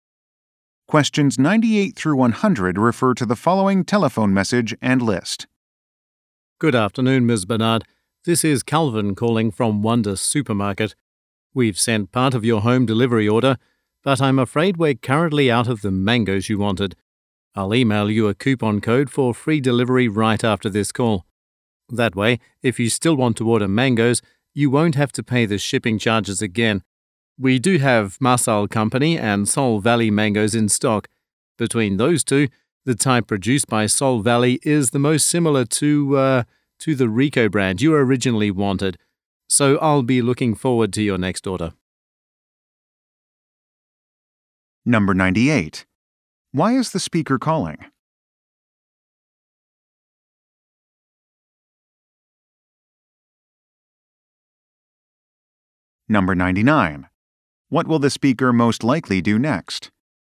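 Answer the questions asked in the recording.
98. The mangoes ordered are out of stock
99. Email a coupon code for free delivery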